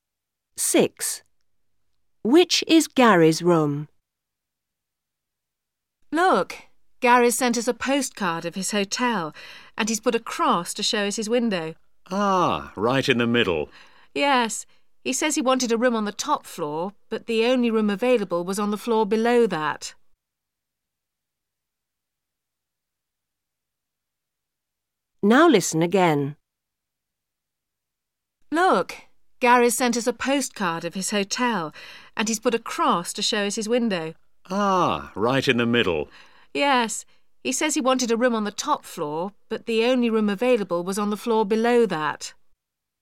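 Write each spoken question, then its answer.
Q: Which is Gary's room?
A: The middle room on the floor below the top floor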